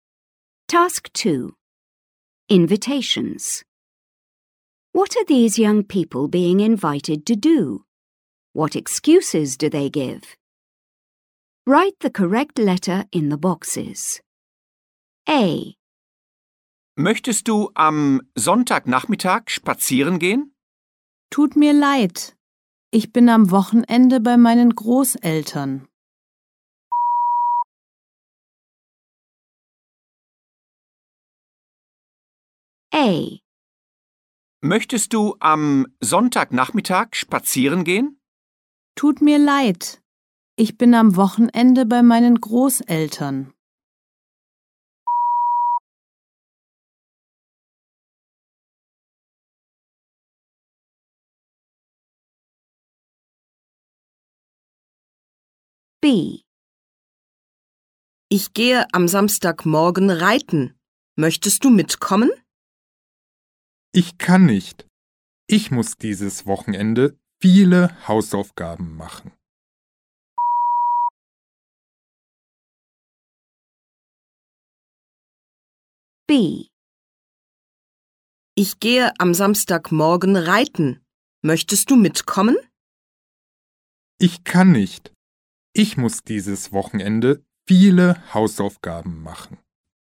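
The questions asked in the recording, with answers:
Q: What are these young people being invited to do?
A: Go for a walk on Sunday afternoon; go horse riding on Saturday morning

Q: What excuses do they give?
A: Visiting grandparents at the weekend; lots of homework this weekend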